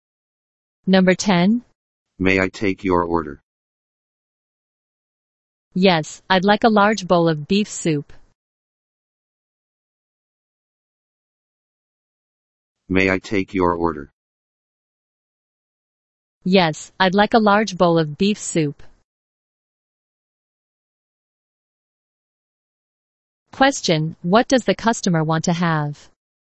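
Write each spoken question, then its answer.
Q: Question, what does the customer want to have?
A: A large bowl of beef soup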